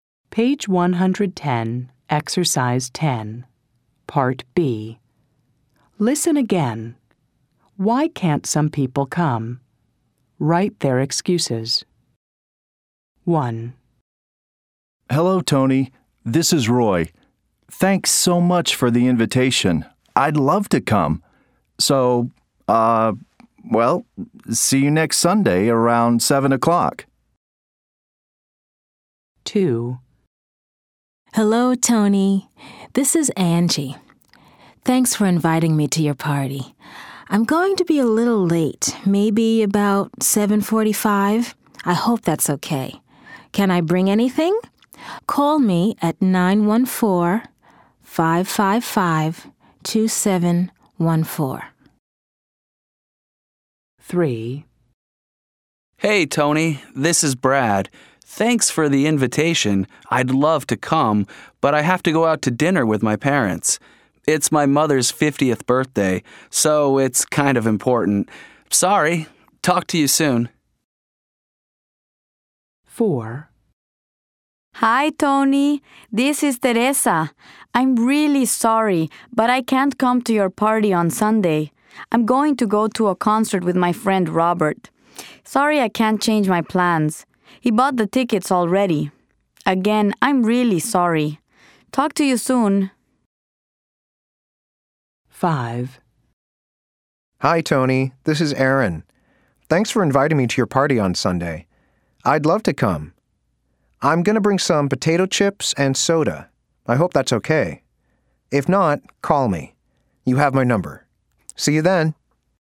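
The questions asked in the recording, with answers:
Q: Why can't some people come?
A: Brad has to go out to dinner with his parents for his mother's 50th birthday.

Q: Why can't some people come?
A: Teresa is going to a concert with her friend Robert, who already bought the tickets.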